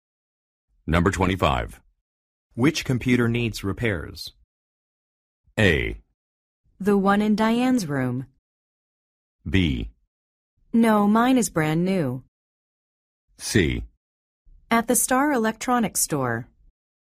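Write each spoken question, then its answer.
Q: Which computer needs repairs?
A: A: The one in Diane's room.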